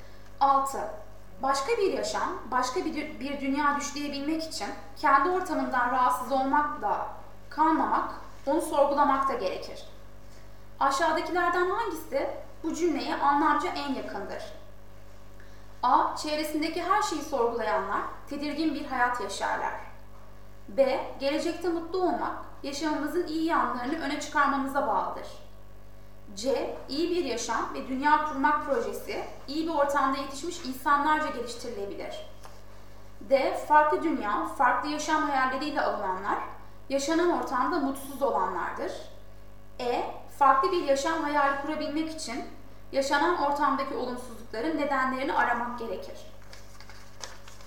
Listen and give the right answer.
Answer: Doğru yanıt E.